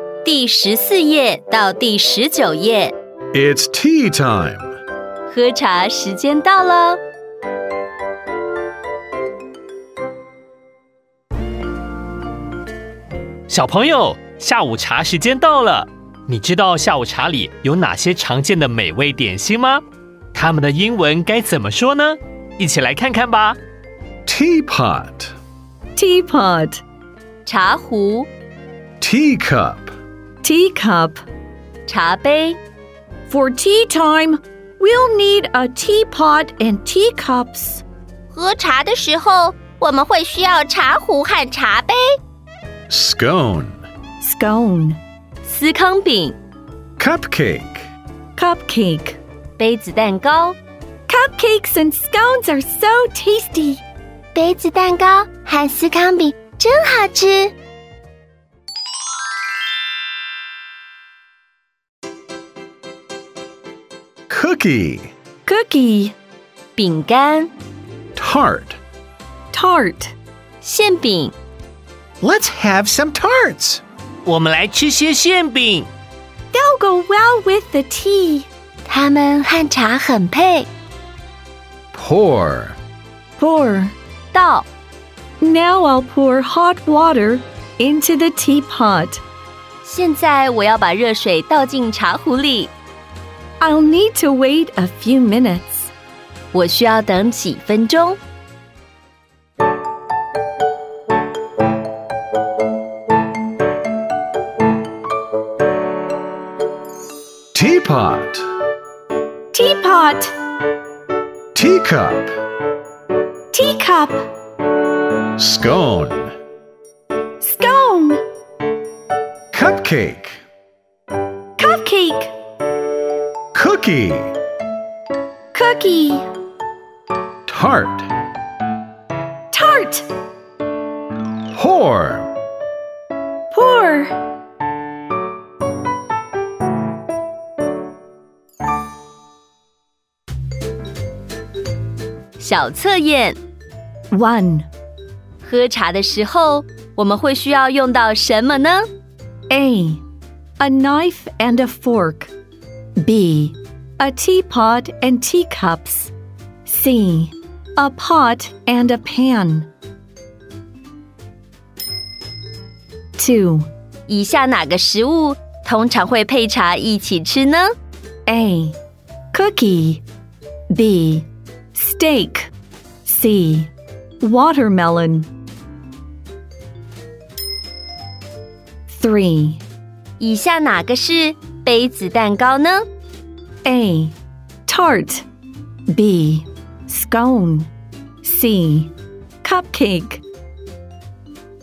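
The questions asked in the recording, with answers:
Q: 喝茶的时候我们会需要用到什么呢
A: B: A teapot and teacups

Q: 以下哪个食物通常会配茶一起吃呢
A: A: Cookie

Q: 以下哪个是杯子蛋糕呢?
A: C: Cupcake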